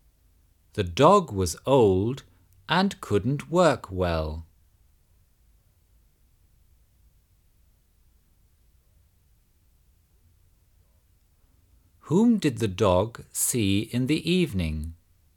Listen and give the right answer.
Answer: He saw a wolf.